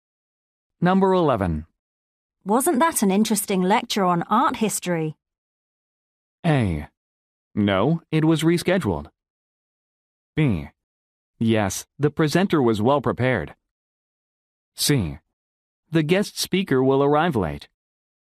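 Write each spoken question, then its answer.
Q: Wasn't that an interesting lecture on art history?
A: B: Yes, the presenter was well prepared.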